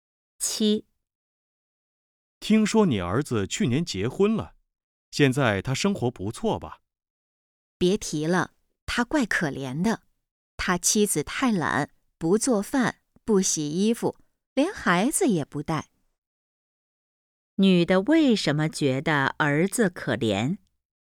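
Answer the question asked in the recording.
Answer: 儿子的妻子太懒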